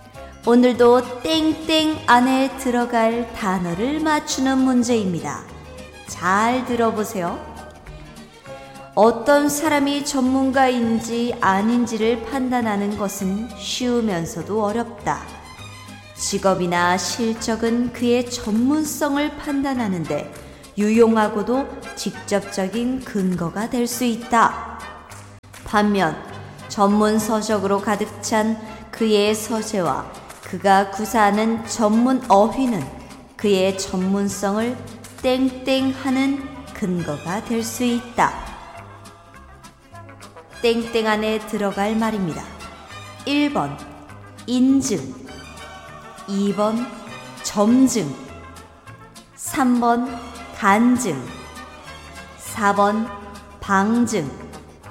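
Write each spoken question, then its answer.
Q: 땡땡 안에 들어갈 말입니다. 1번 인증, 2번 점증, 3번 간증, 4번 방증.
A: 4: 방증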